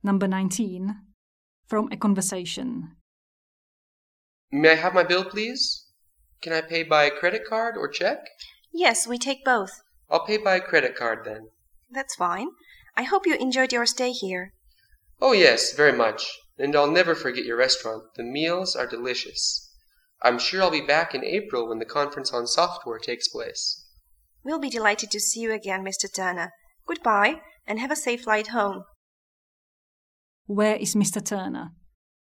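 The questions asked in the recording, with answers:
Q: Where is Mr. Turner?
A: At a hotel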